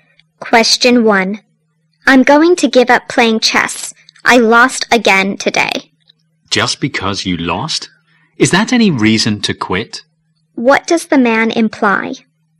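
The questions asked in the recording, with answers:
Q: What does the man imply?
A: Losing a game is no reason to give up playing chess.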